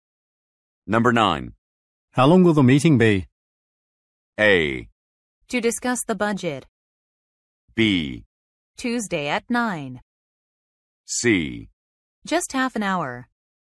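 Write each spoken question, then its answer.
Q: How long will the meeting be?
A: C: Just half an hour.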